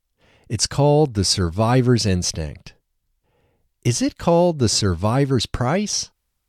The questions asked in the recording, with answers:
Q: Is it called the survivor's price?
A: No, it's not called the survivor's price.